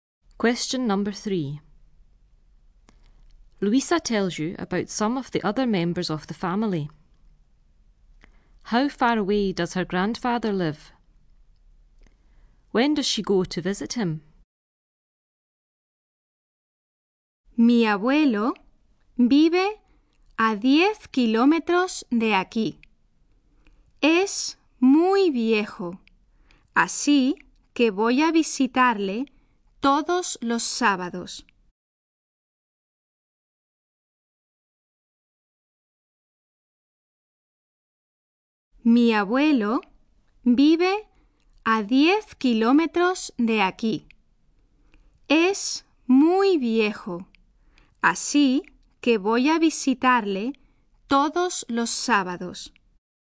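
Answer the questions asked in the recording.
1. 10 kilometres
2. Every Saturday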